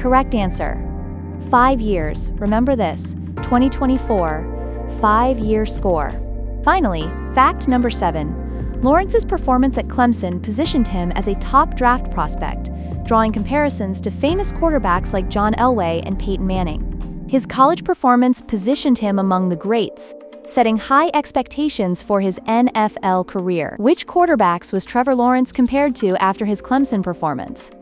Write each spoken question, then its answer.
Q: Which quarterbacks was Trevor Lawrence compared to after his Clemson performance?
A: Correct answer, John Elway and Peyton Manning.